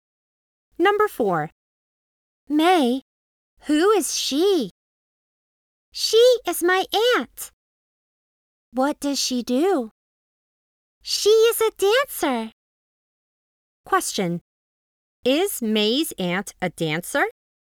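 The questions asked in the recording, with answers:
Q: Is May's aunt a dancer?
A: Yes, she is.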